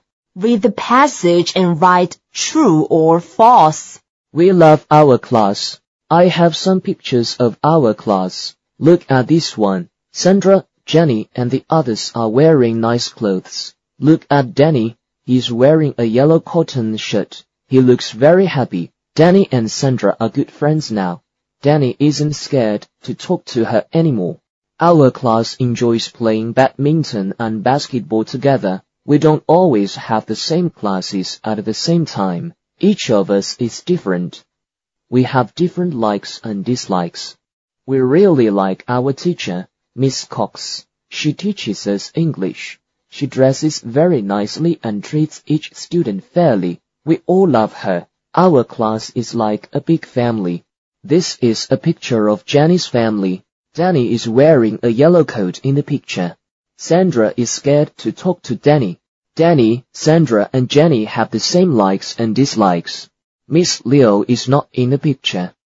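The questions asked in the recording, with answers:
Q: This is a picture of Jenny's family.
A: False

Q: Danny is wearing a yellow coat in the picture.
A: False

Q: Sandra is scared to talk to Danny.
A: False

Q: Danny, Sandra, and Jenny have the same likes and dislikes.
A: False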